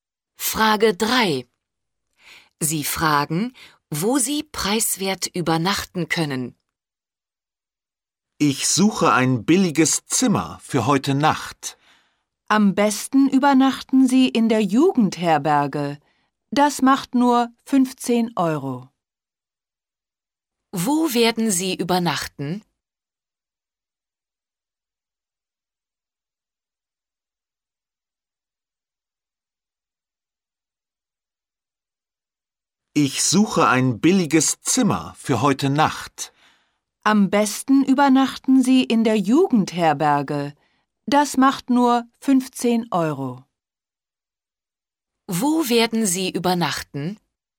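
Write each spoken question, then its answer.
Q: Wo werden Sie übernachten?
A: In der Jugendherberge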